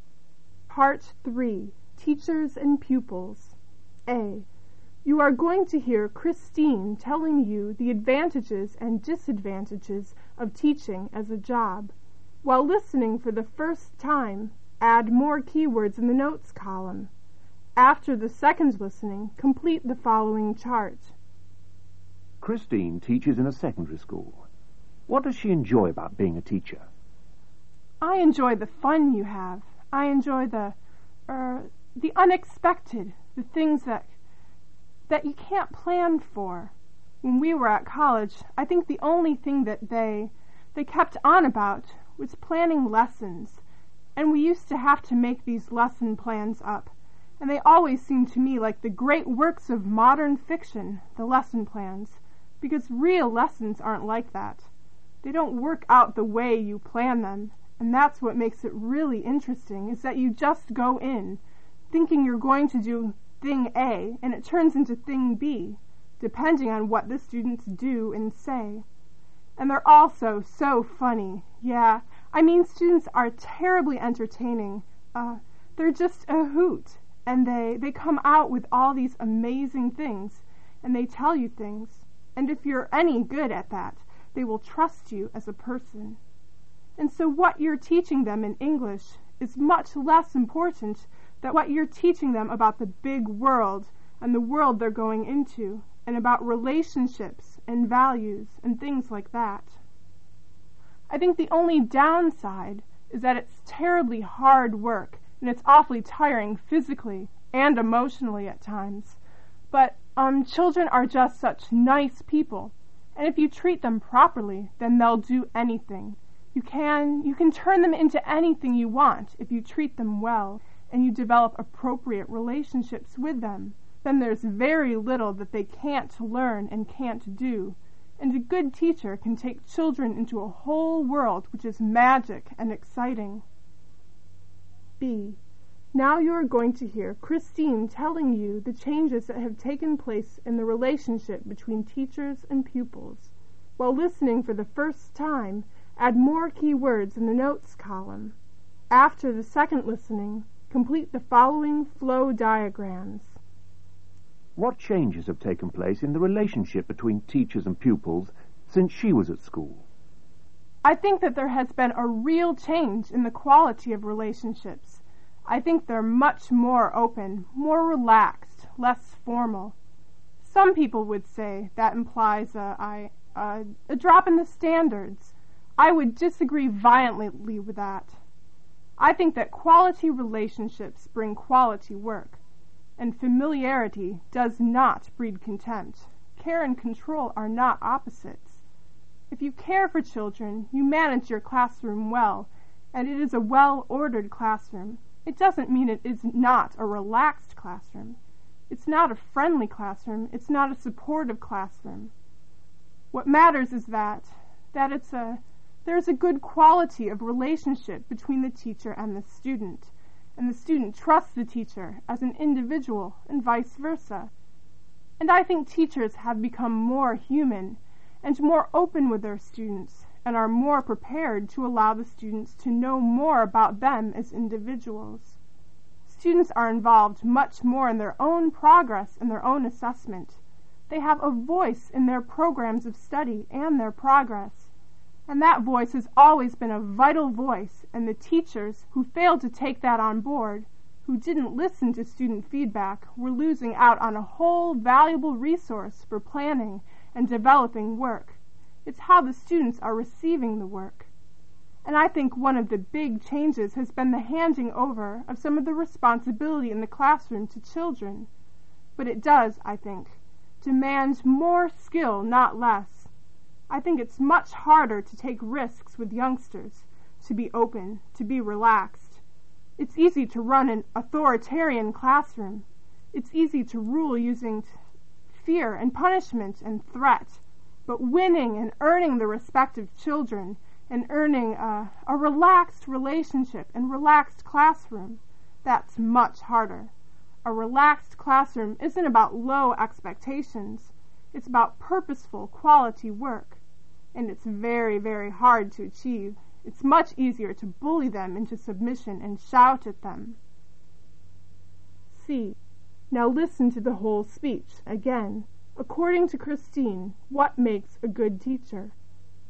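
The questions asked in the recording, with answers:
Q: What does she enjoy about being a teacher?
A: The fun and the unexpected; students are entertaining

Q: What changes have taken place in the relationship between teachers and pupils since she was at school?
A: Relationships are more open, relaxed and less formal; students have more say and responsibility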